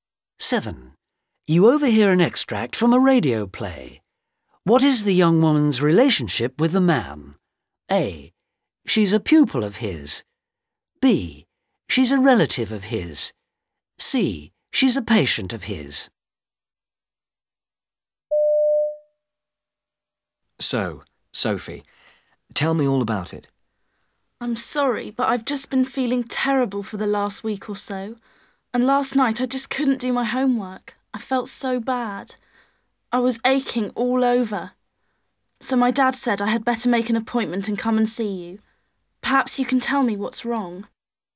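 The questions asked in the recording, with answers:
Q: What is the young woman's relationship with the man?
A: C: She's a patient of his.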